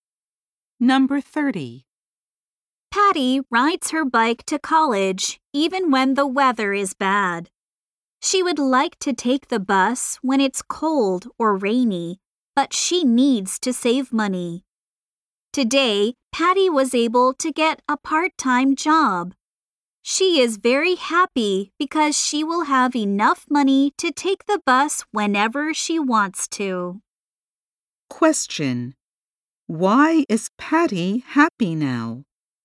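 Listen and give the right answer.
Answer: She got a part-time job, so she can afford to take the bus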